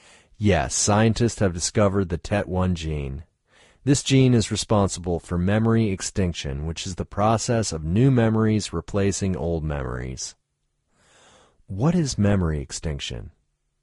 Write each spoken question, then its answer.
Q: What is memory extinction?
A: Memory extinction is the process of new memories replacing old ones.